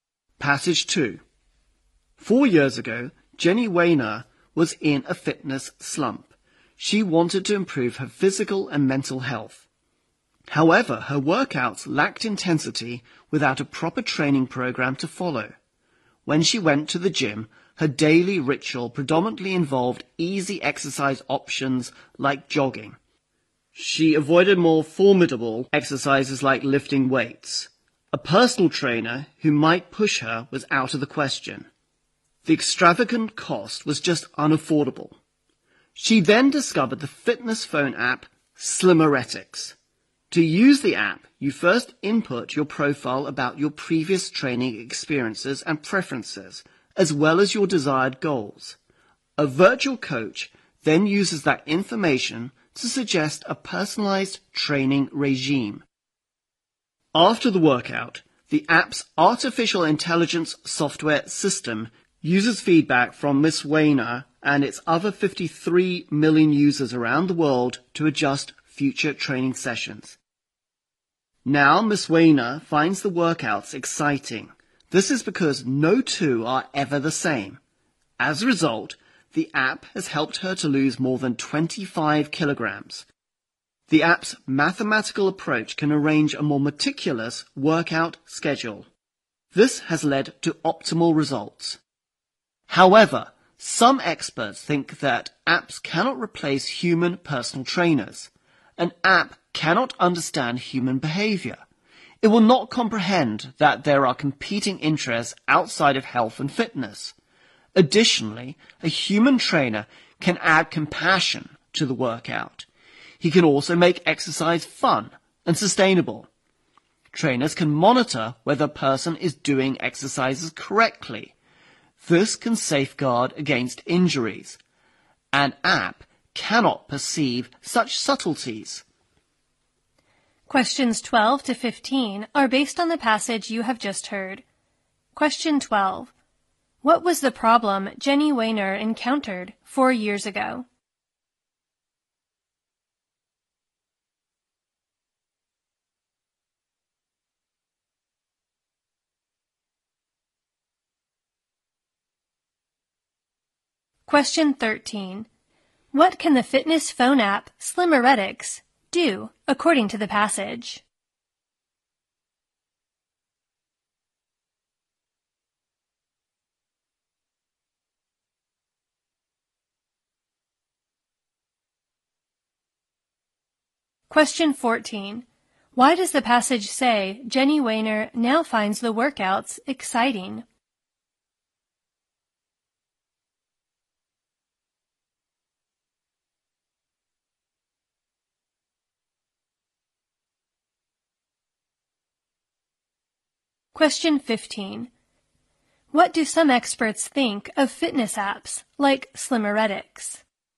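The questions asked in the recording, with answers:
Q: What was the problem Jenny Wehner encountered 4 years ago?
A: She was in a fitness slump; her workouts lacked intensity

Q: What can the fitness phone app Slimmeretics do according to the passage?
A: Suggest a personalized training regime and adjust it using feedback

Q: Why does the passage say Jenny Wainer now finds the workouts exciting?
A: No two workouts are ever the same

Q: What do some experts think of fitness apps like Slimmeretics?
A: They cannot replace human personal trainers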